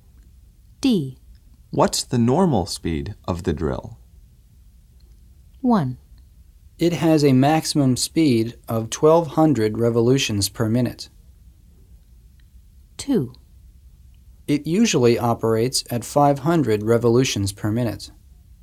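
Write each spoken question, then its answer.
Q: What's the normal speed of the drill?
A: 2: It usually operates at 500 revolutions per minute.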